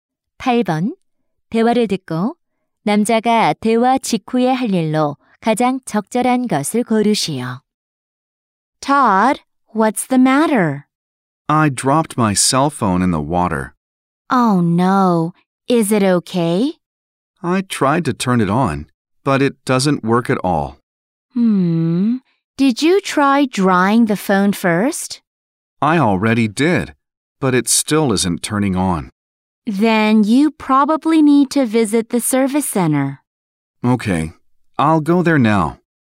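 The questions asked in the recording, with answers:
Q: 대화를 듣고 남자가 대화 직후에 할 일로 가장 적절한 것을 고르시오.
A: 서비스 센터 방문하기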